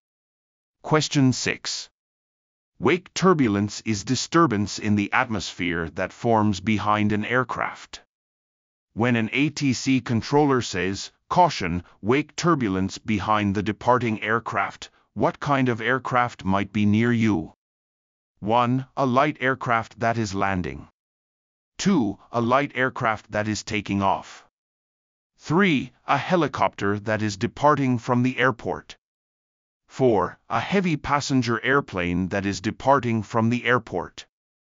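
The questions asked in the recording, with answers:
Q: When an ATC controller says, "Caution, wake turbulence behind the departing aircraft," what kind of aircraft might be near you?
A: 4: A heavy passenger airplane that is departing from the airport.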